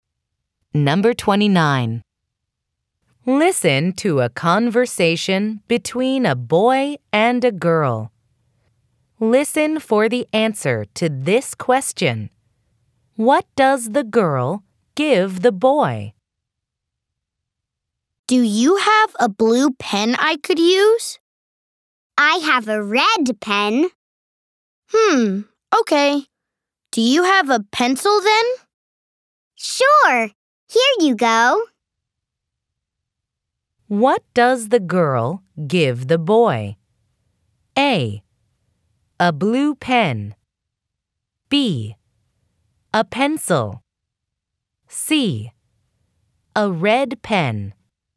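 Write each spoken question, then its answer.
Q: What does the girl give the boy?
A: B: A pencil.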